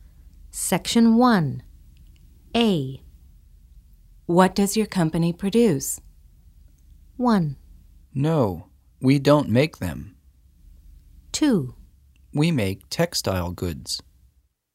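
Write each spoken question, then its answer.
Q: What does your company produce?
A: 2: We make textile goods.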